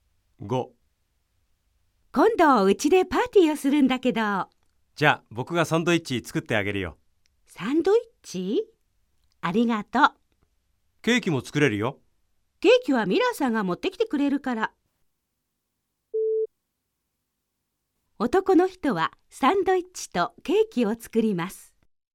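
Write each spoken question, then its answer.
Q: 男の人はサンドイッチとケーキを作ります。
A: ×(正しくない:ケーキはミラーさんが持ってくる)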